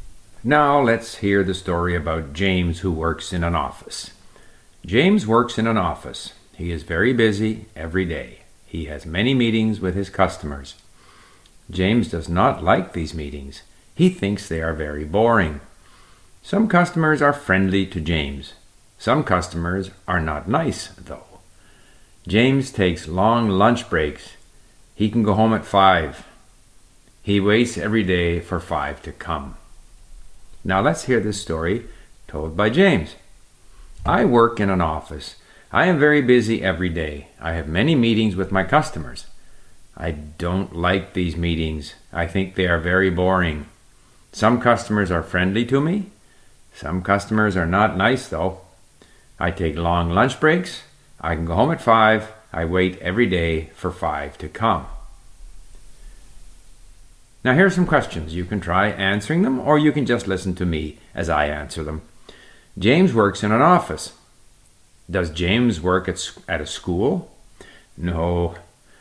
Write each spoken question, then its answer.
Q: Does James work at a school?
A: No, James works in an office.